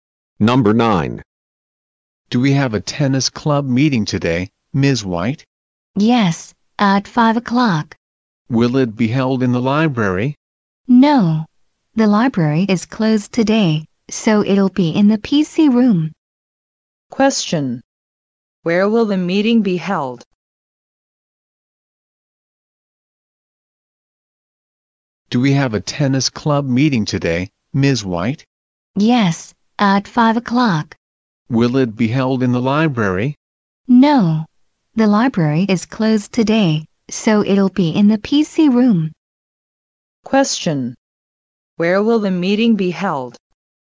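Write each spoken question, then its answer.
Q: Where will the meeting be held?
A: In the PC room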